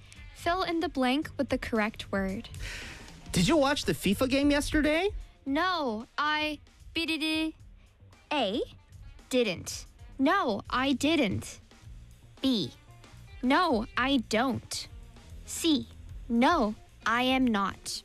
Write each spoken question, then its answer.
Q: Fill in the blank with the correct word.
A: That's right. No, I didn't.